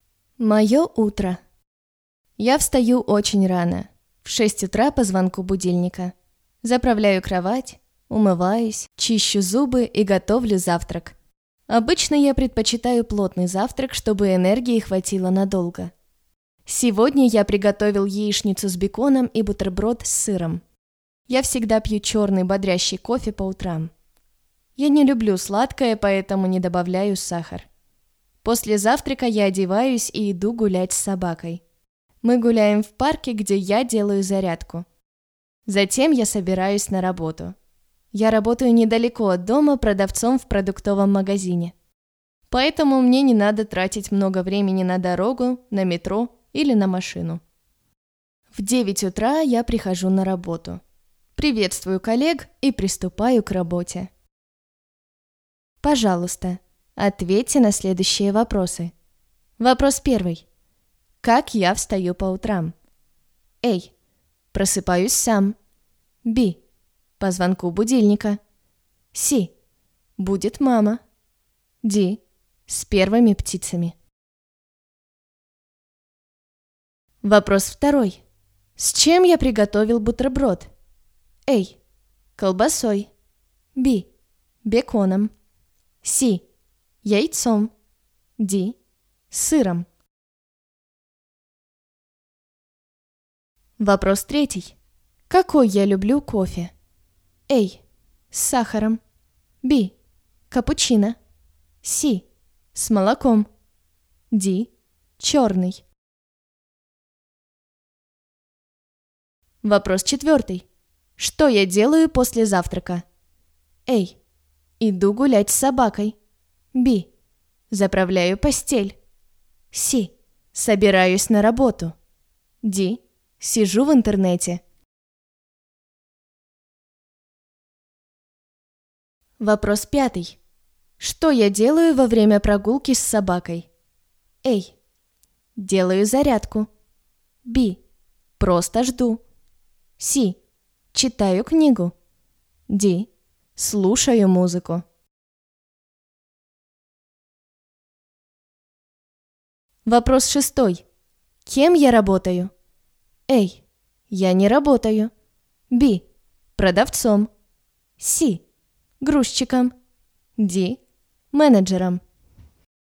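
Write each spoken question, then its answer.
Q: Как я встаю по утрам?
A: B: По звонку будильника.

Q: С чем я приготовил бутерброд?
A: Д: Сыром.

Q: Какой я люблю кофе?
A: Д: Черный.

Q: Что я делаю после завтрака?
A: А: Иду гулять с собакой.

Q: Что я делаю во время прогулки с собакой?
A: А: Делаю зарядку.

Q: Кем я работаю?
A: Б: Продавцом.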